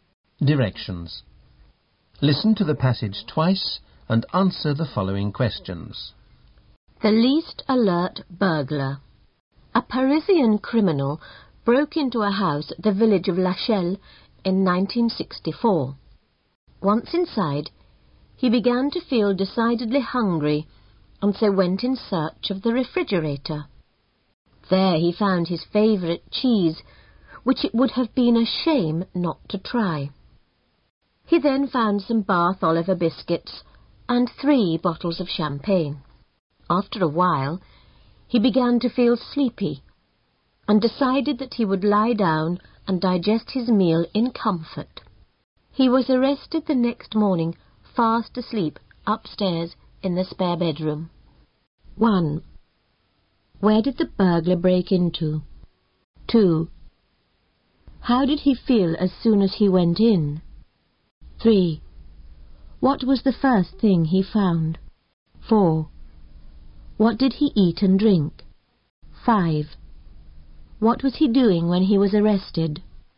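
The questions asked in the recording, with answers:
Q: Where did the burglar break into?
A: A house in the village of Lachelle.

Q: How did he feel as soon as he went in?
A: Very hungry.

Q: What was the first thing he found?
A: His favourite cheese.

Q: What did he eat and drink?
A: Cheese, Bath Oliver biscuits and 3 bottles of champagne.

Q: What was he doing when he was arrested?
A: Sleeping upstairs in the spare bedroom.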